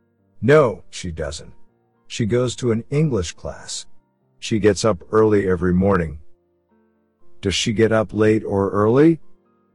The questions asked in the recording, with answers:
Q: Does she get up late or early?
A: Early? She gets up early.